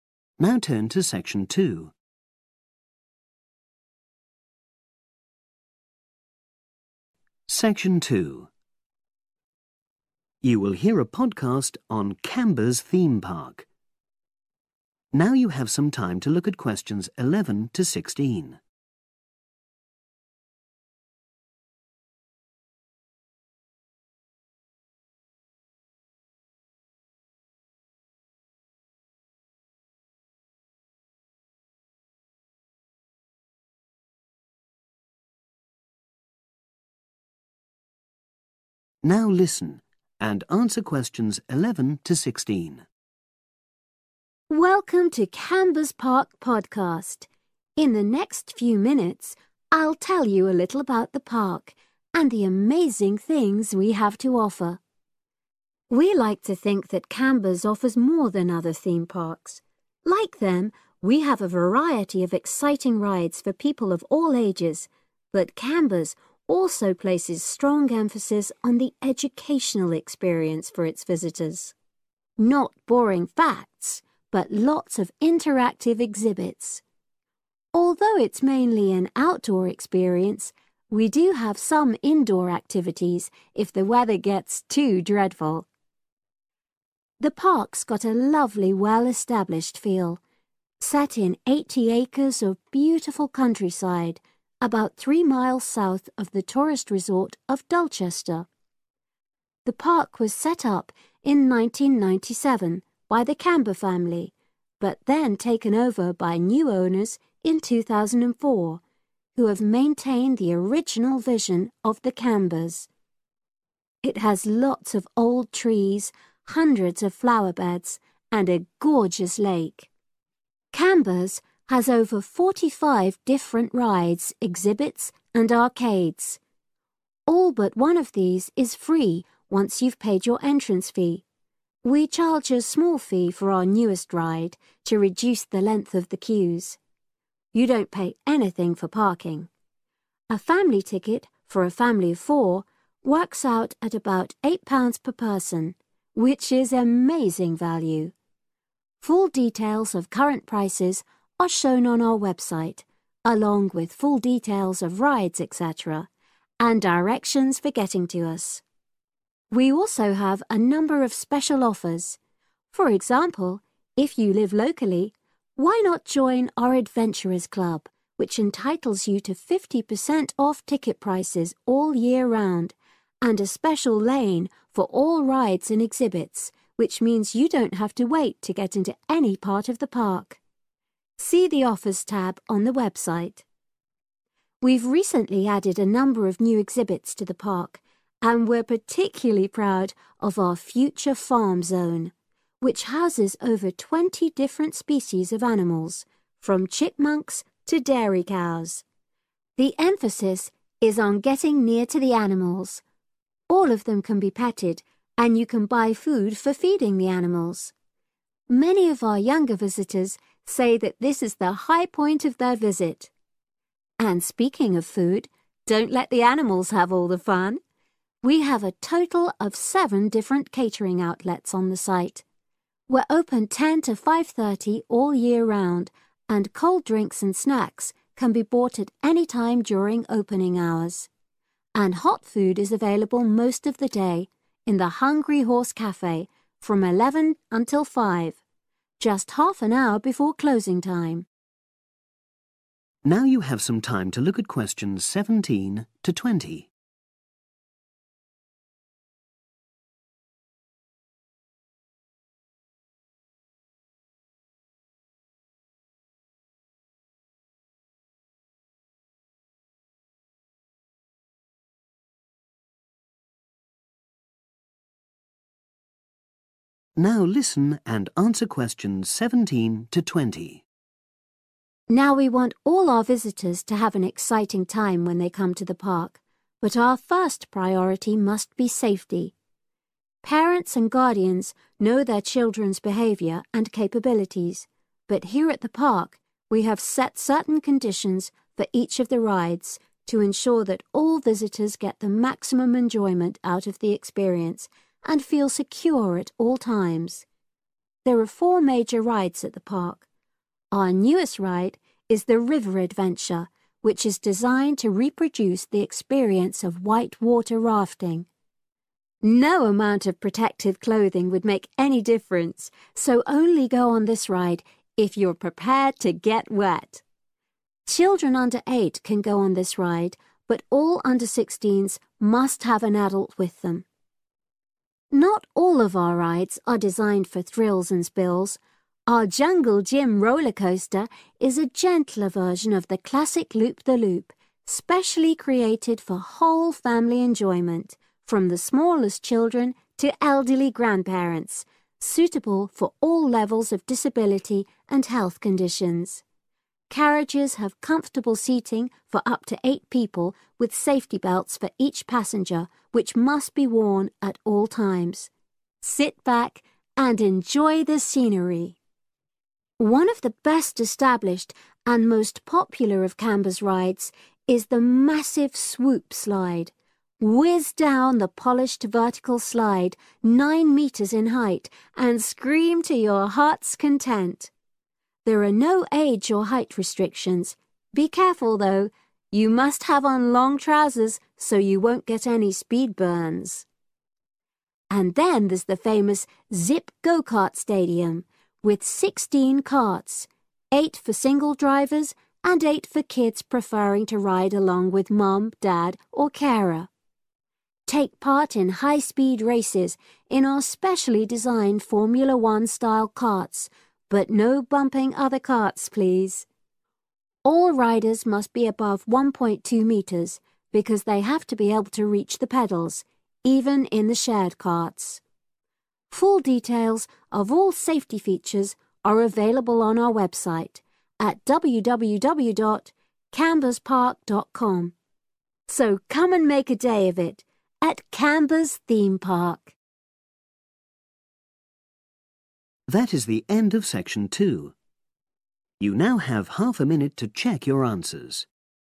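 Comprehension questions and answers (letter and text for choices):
Choose the correct letter A, B or C.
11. According to the speaker, in what way is Camber's different from other theme parks?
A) it is suitable for different age groups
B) it offers lots to do in wet weather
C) it has a focus on education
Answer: C) it has a focus on education

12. The park first opened in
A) 1980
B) 1997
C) 2004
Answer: B) 1997

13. What is included in the entrance fee?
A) most rides and parking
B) all rides and some exhibits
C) parking and all rides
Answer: A) most rides and parking

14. Becoming a member of the Adventurers Club means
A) you can avoid queuing so much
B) you can enter the park free for a year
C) you can visit certain zones closed to other people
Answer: A) you can avoid queuing so much

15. The Future Farm zone encourages visitors to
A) buy animals as pets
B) learn about the care of animals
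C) get close to the animals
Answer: C) get close to the animals

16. When is hot food available in the park?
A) 10 am – 5.30 pm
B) 11 am – 5 pm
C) 10.30 am – 5 pm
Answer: B) 11 am – 5 pm

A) Must be over a certain age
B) Must use special safety equipment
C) Must avoid it if they have health problems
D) Must wear a particular type of clothing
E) Must be over a certain height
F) Must be accompanied by an adult if under 16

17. River Adventure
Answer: F) Must be accompanied by an adult if under 16

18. Jungle Jim Rollercoaster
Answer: B) Must use special safety equipment

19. Swoop Slide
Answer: D) Must wear a particular type of clothing

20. Zip Go-carts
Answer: E) Must be over a certain height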